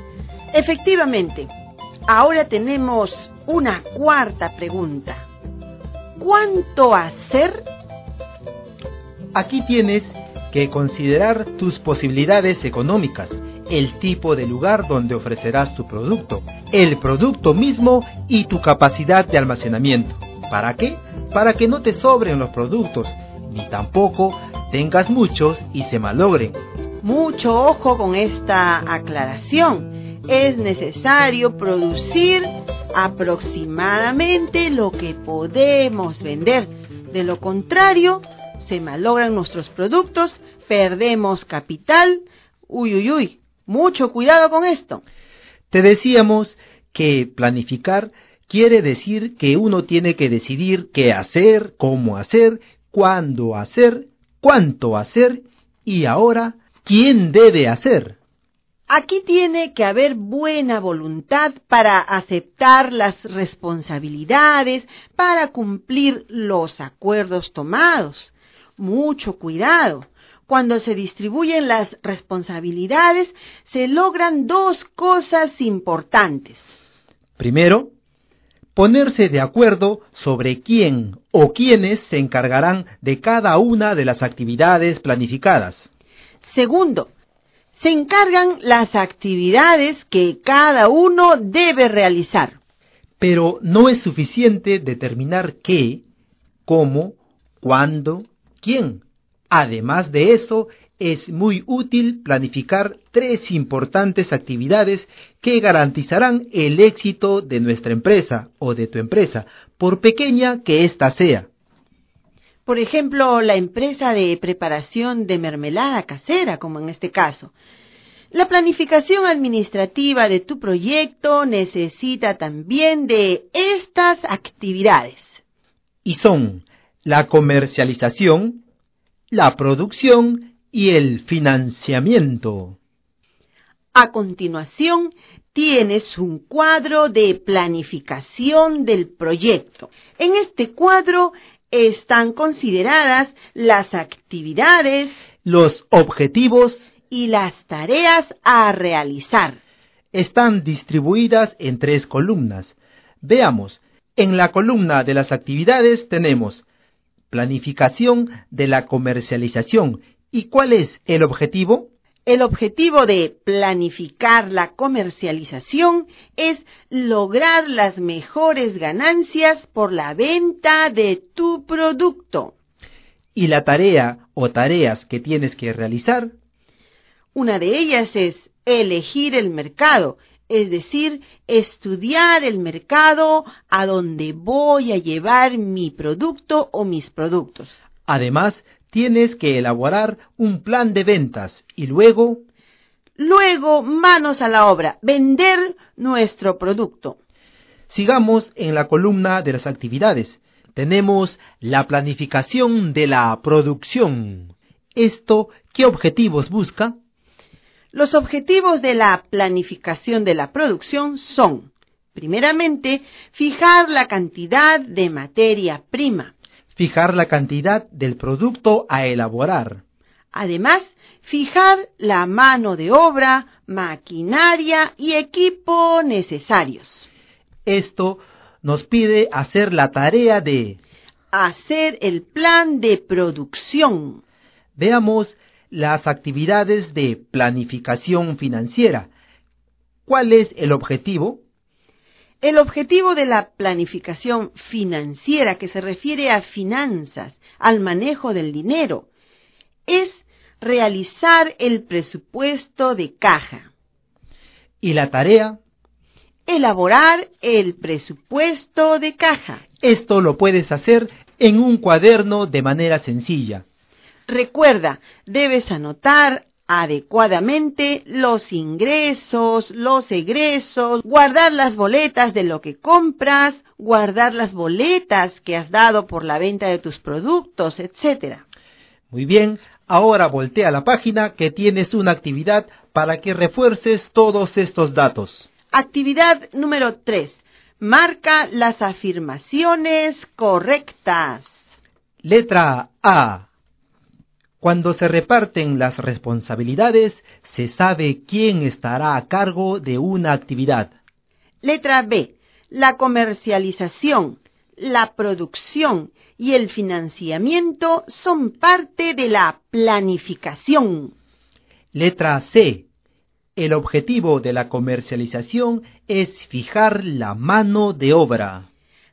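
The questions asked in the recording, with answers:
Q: Cuando se reparten las responsabilidades, se sabe quién estará a cargo de una actividad.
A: Correcta

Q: La comercialización, la producción y el financiamiento son parte de la planificación.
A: Correcta

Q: El objetivo de la comercialización es fijar la mano de obra.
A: Incorrecta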